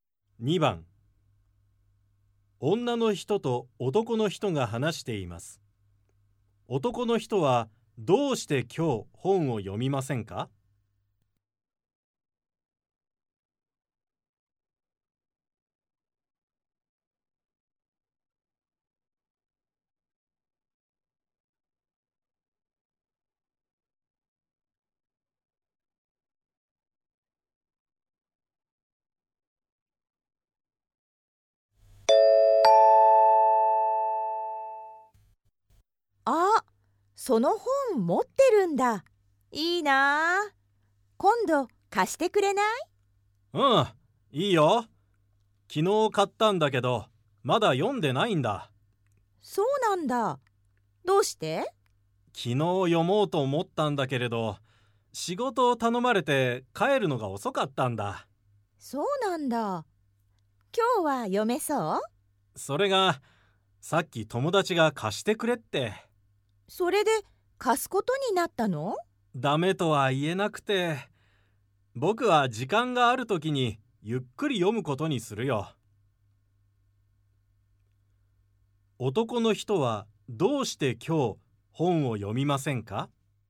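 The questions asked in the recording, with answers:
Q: 男の人はどうして今日本を読みませんか?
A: 友達に本を貸すことになったから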